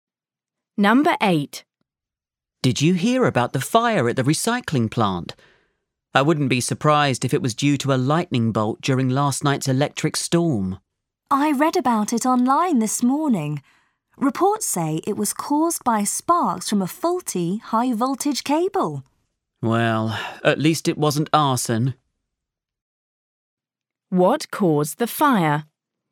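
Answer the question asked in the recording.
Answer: sparks from a faulty high-voltage cable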